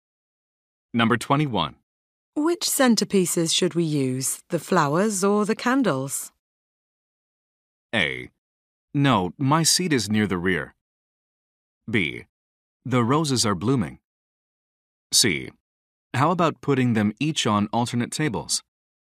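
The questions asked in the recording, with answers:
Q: Which centerpieces should we use, the flowers or the candles?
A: C: How about putting them each on alternate tables?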